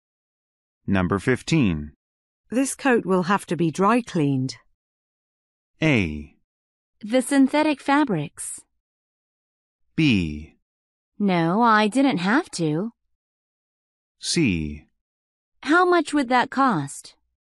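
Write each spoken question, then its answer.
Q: This coat will have to be dry cleaned.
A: C: How much would that cost?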